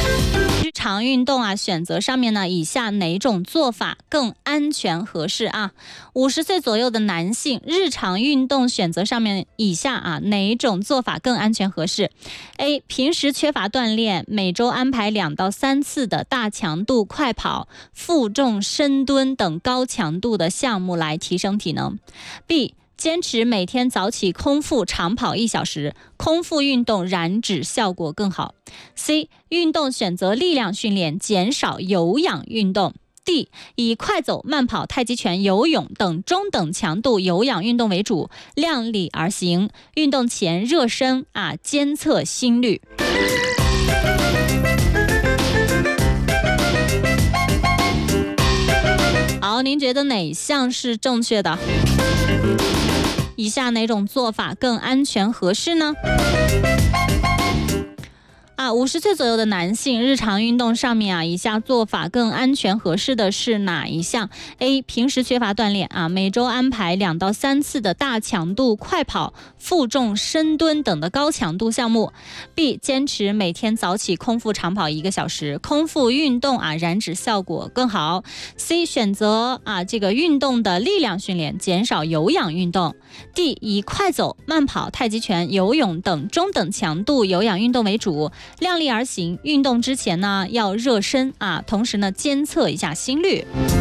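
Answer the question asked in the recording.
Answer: D: 以快走、慢跑、太极拳、游泳等中等强度有氧运动为主,量力而行,运动前热身,监测心率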